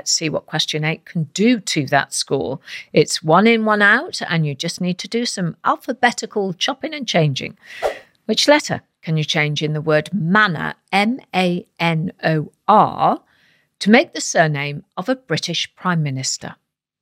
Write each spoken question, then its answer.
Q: Which letter can you change in the word manor, M-A-N-O-R, to make the surname of a British Prime Minister?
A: And the answer is change the letter N for a letter J to get the word major, M-A-J-O-R.